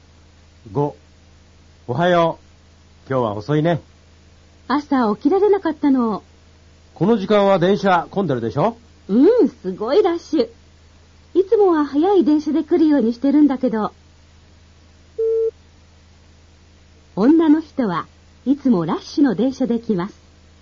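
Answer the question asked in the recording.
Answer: 正しくない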